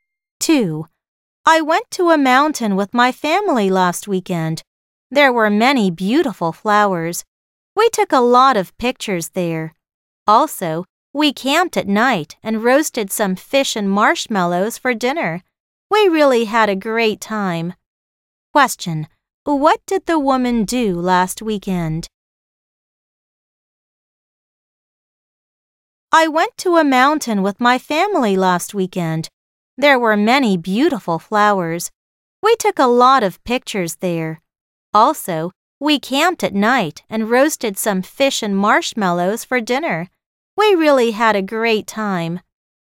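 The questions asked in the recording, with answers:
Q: Question, what did the woman do last weekend?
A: She went to a mountain with her family, took pictures and camped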